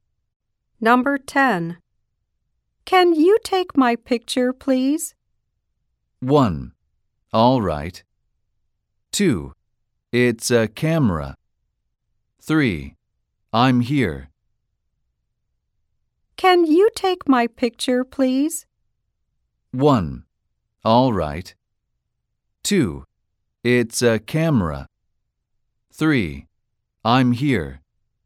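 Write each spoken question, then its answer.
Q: Can you take my picture, please?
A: 1: All right.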